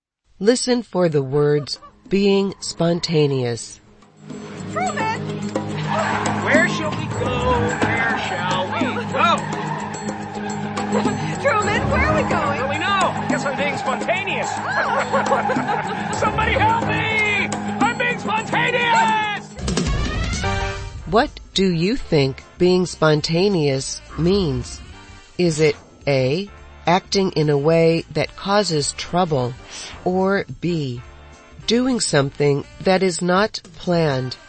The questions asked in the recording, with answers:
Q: What do you think being spontaneous means? Is it A, acting in a way that causes trouble, or B, doing something that is not planned?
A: The answer is B. Being spontaneous is doing something that is not planned.